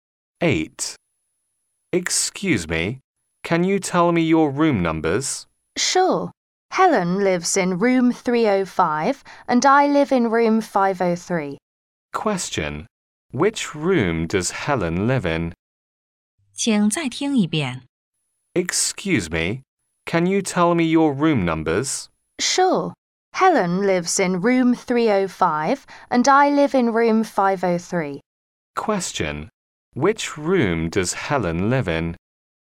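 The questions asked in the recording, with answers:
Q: Which room does Helen live in?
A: Room 305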